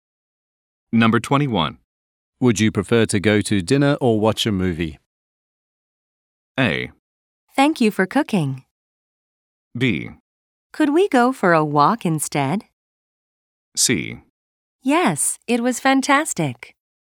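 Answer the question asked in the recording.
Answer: B: Could we go for a walk instead?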